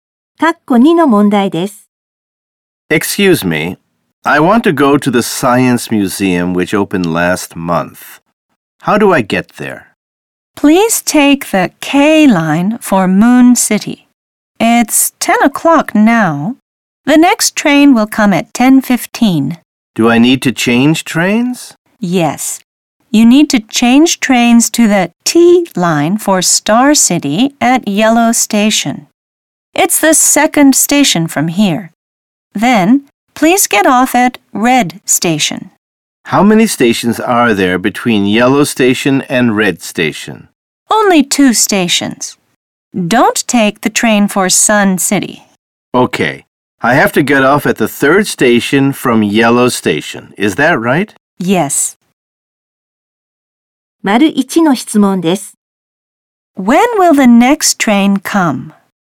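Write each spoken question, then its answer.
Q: When will the next train come?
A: At 10:15.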